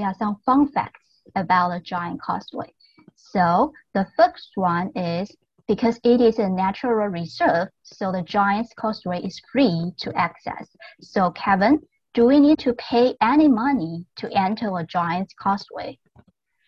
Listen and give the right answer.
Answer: No.